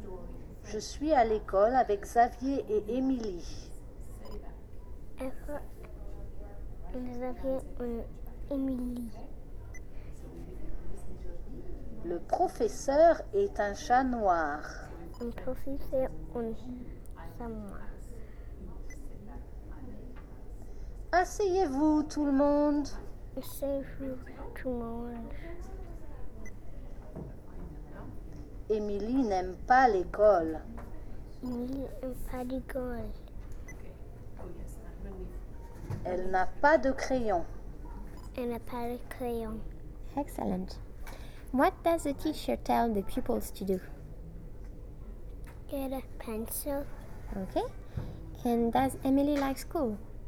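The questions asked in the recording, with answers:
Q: What does the teacher tell the pupils to do?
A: Sit down

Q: And does Emily like school?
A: No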